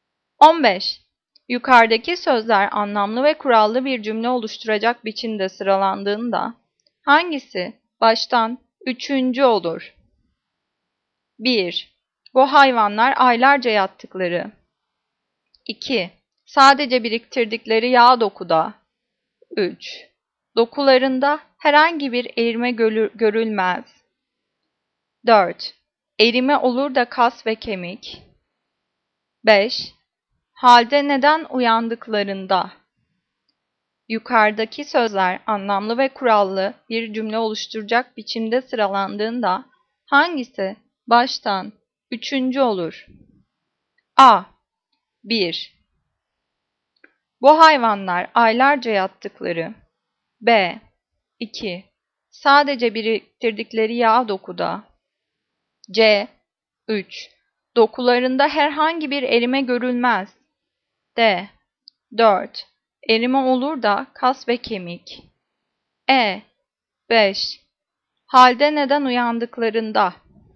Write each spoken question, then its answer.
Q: Yukarıdaki sözler anlamlı ve kurallı bir cümle oluşturacak biçimde sıralandığında hangisi baştan üçüncü olur?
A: Cevap B. 2. Sadece biriktirdikleri yağ dokuda.